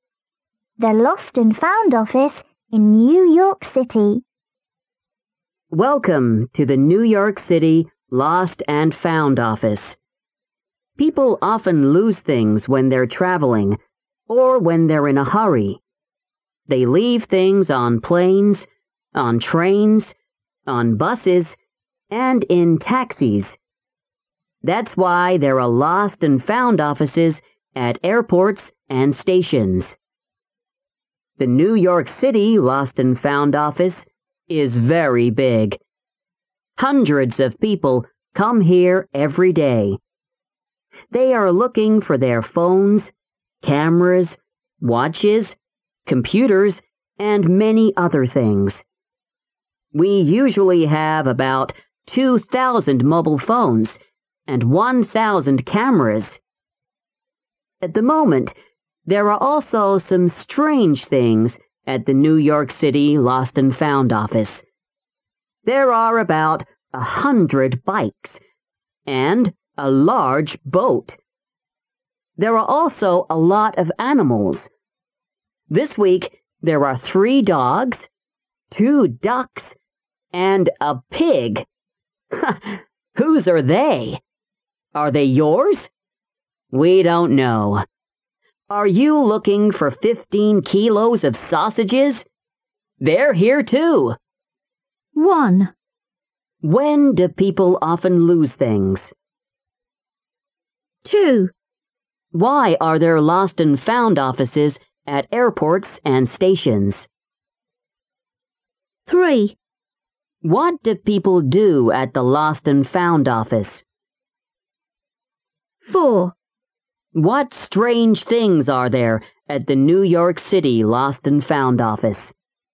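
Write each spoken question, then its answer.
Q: When do people often lose things?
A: When they're traveling or when they're in a hurry

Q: Why are there lost and found offices at airports and stations?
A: Because people leave things on planes, trains, buses and in taxis

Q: What do people do at the Lost and Found Office?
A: They look for their lost things, like phones, cameras, watches and computers

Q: What strange things are there at the New York City Lost and Found Office?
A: About 100 bikes, a large boat, animals (3 dogs, 2 ducks, a pig) and 15 kilos of sausages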